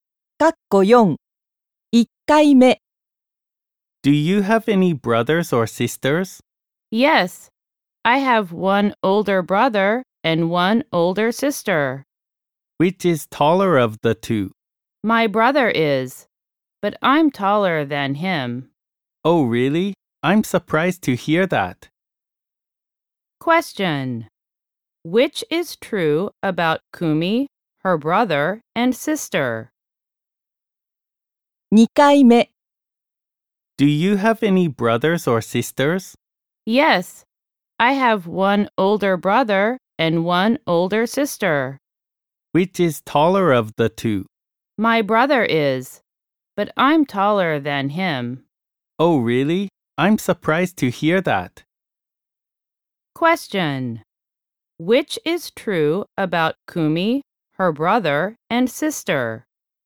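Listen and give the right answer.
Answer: Kumi is the tallest of the three; her brother is taller than her sister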